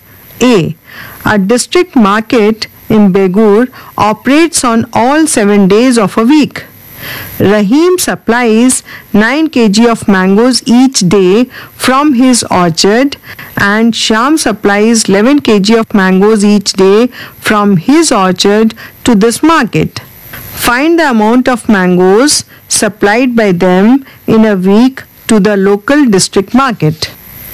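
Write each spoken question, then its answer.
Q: Find the amount of mangoes supplied by them in a week to the local district market.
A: 140 kg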